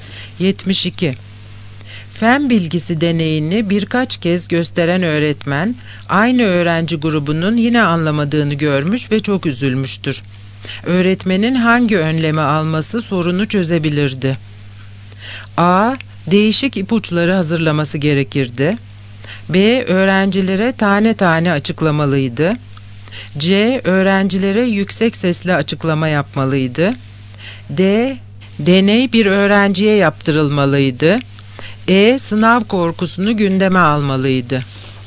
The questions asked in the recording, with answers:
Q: Öğretmenin hangi önlemi alması sorunu çözebilirdi?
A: Yanıt A. Değişik ipuçları hazırlaması gerekirdi.